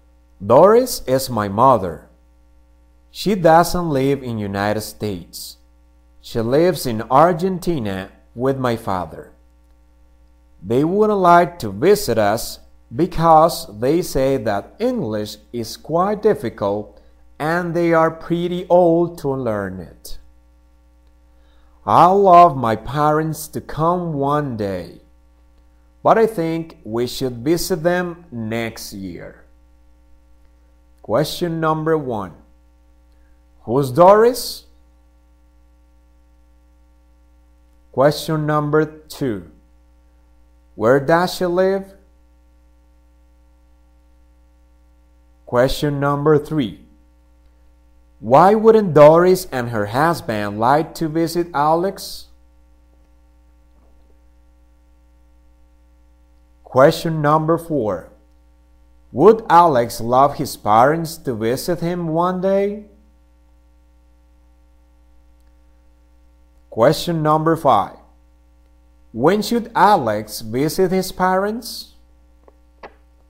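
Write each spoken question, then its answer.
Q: Who's Doris?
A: Alex's mother

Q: Where does she live?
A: In Argentina

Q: Why wouldn't Doris and her husband like to visit Alex?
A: English is difficult and they are too old to learn it

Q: Would Alex love his parents to visit him one day?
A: Yes

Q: When should Alex visit his parents?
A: Next year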